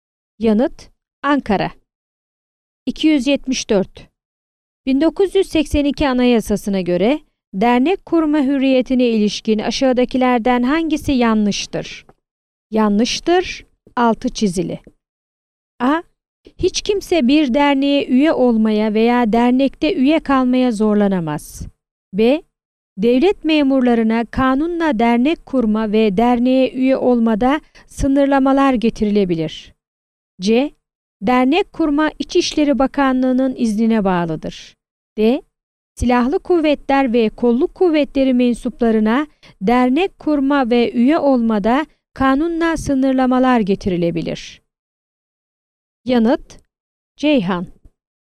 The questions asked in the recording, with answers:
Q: 1982 Anayasasına göre dernek kurma hürriyetine ilişkin aşağıdakilerden hangisi yanlıştır?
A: Yanıt: Ceyhan.